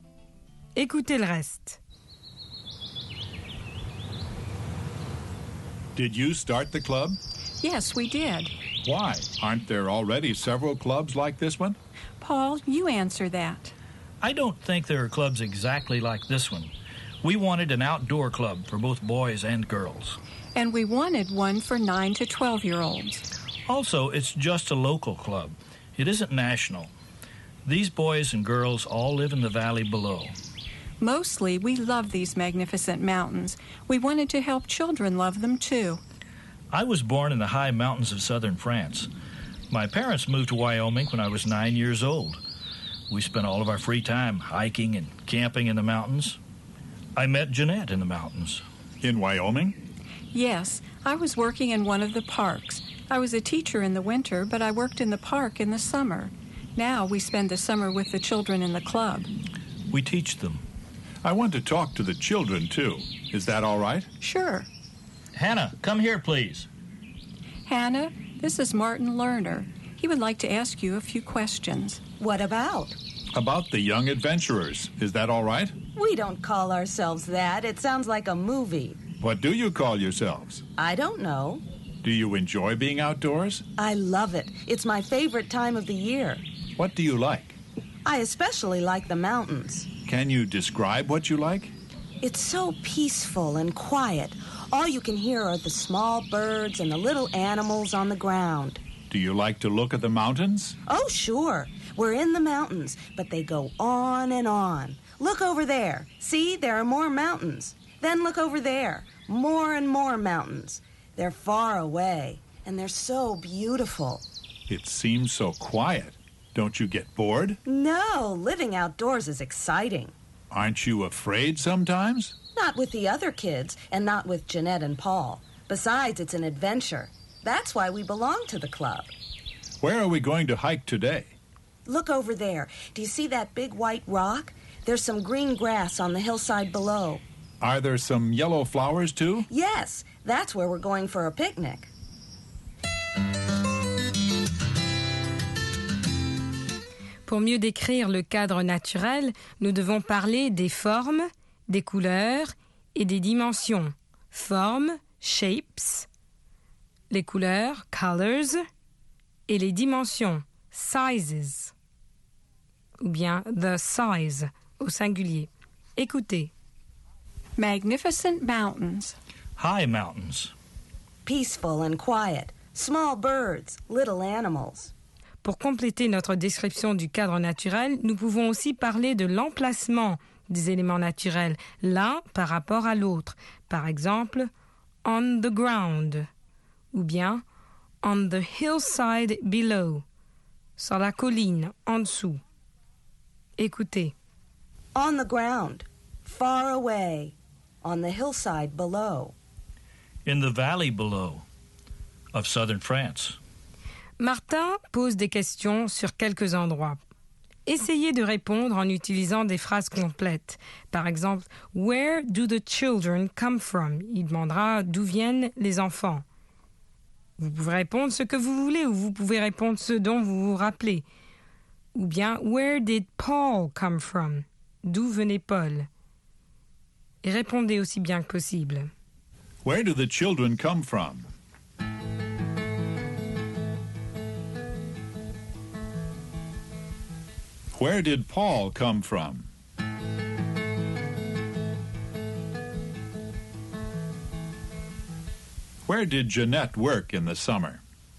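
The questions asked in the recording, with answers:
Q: Where do the children come from?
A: They live in the valley below.

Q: Where did Paul come from?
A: The high mountains of southern France.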